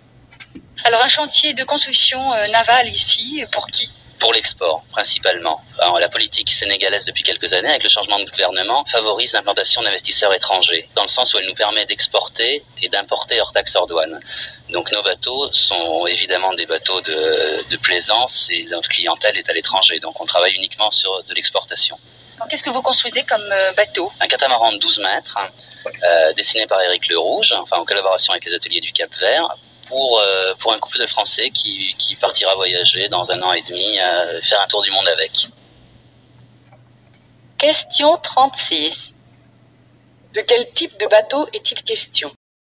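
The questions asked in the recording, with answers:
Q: De quel type de bateau est-il question ?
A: Un catamaran de plaisance de 12 mètres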